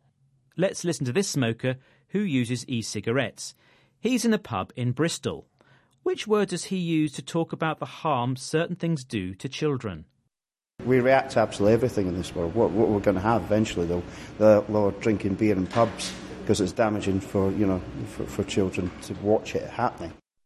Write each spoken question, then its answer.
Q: Which word does he use to talk about the harm certain things do to children?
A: He uses the word damaging, meaning harmful.